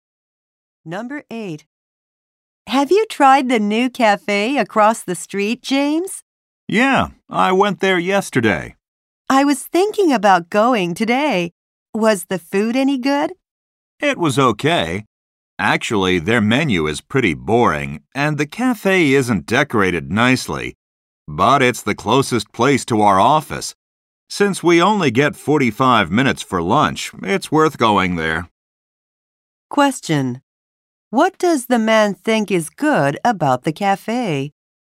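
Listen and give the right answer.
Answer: It is the closest place to their office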